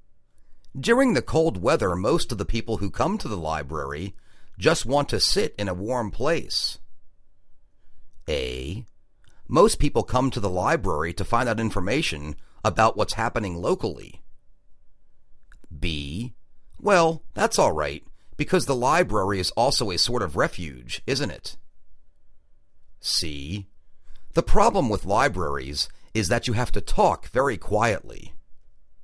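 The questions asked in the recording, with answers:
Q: During the cold weather, most of the people who come to the library just want to sit in a warm place.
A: B: Well, that's all right, because the library is also a sort of refuge, isn't it?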